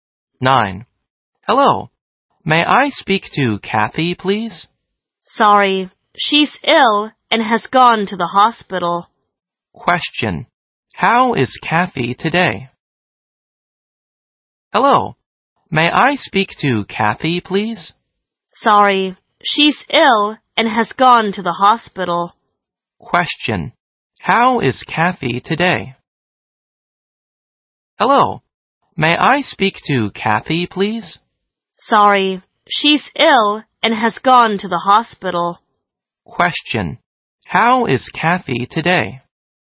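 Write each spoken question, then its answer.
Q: How is Kathy today?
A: She is ill.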